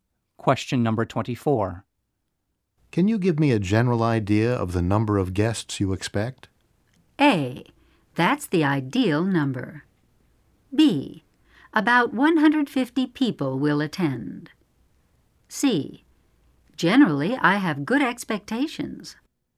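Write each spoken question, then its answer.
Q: Can you give me a general idea of the number of guests you expect?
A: B: About 150 people will attend.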